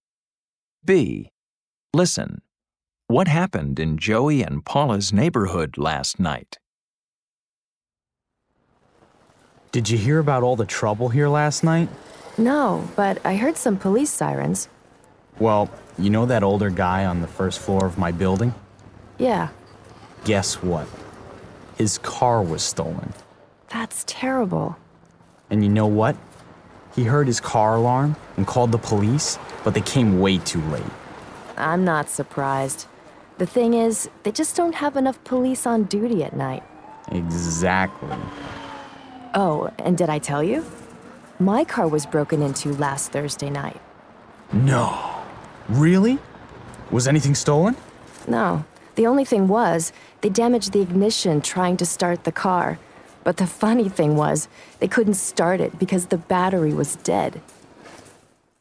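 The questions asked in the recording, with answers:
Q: What happened in Joey and Paula's neighborhood last night?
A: A neighbor's car was stolen.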